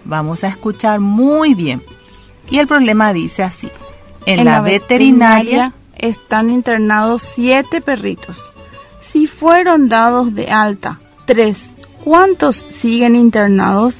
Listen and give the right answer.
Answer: Siguen internados 4 perritos en la veterinaria